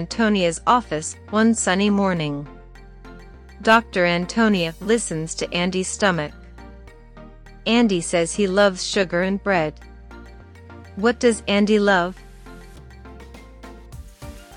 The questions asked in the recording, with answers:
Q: What does Andy love?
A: Sugar and bread. Andy loves sugar and bread.